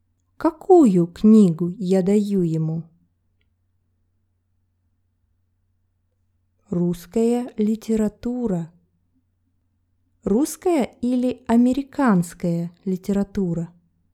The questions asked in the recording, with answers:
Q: русская или американская литература?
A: Русская. Русская литература.